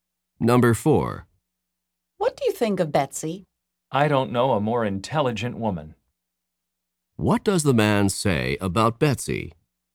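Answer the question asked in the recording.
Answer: She is the most intelligent woman he knows.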